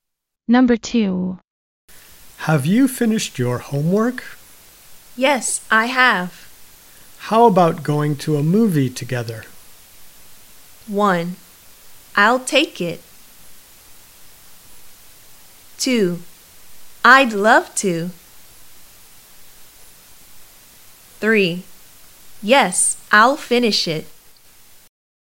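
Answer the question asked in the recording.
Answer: 2: I'd love to.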